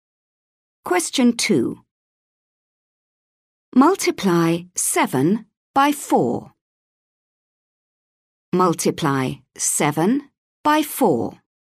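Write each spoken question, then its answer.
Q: Multiply 7 by 4.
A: 28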